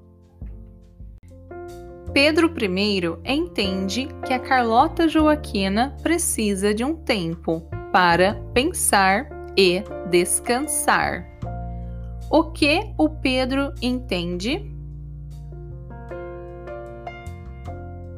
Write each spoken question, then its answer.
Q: O que o Pedro entende?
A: Ele entende que a Carlota Joaquina precisa de um tempo para pensar e descansar.